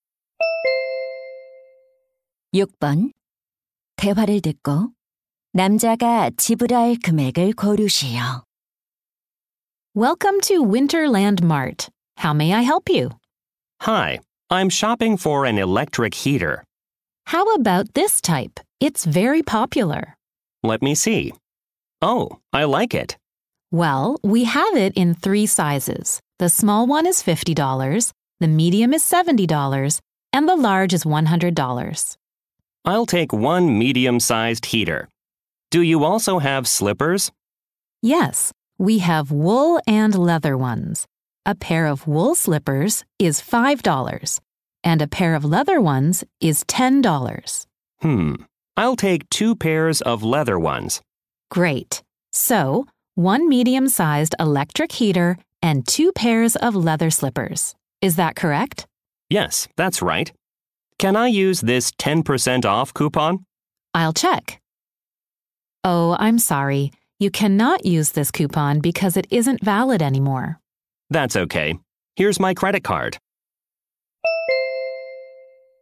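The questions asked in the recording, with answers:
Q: 대화를 듣고 남자가 지불할 금액을 고르시오.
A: $90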